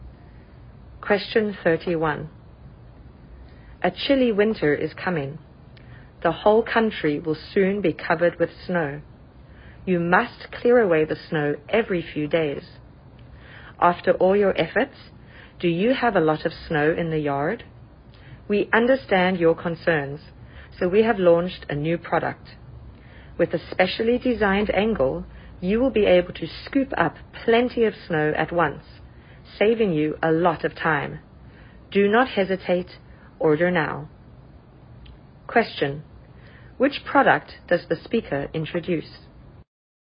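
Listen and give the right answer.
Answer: A snow shovel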